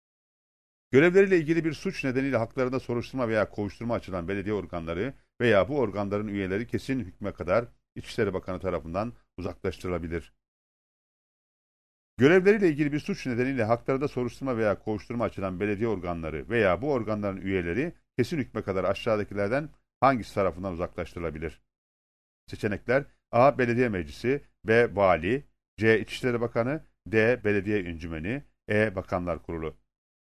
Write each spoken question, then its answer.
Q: Görevleriyle ilgili bir suç nedeniyle haklarında soruşturma veya kovuşturma açılan belediye organları veya bu organların üyeleri kesin hükme kadar aşağıdakilerden hangisi tarafından uzaklaştırılabilir?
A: Doğru cevap C seçeneğidir.